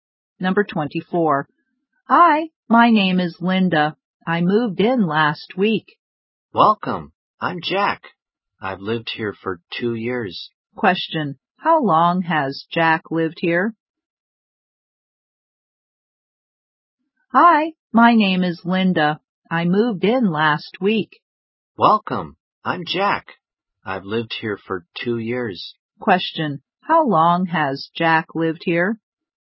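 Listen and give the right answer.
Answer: For 2 years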